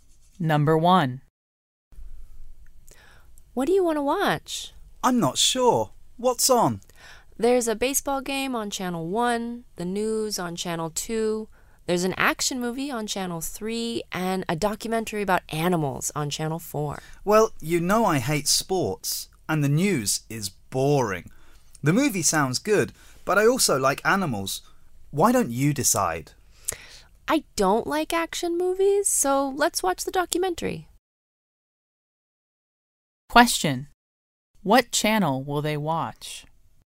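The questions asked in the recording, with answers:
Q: What channel will they watch?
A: Channel 4 (the animal documentary)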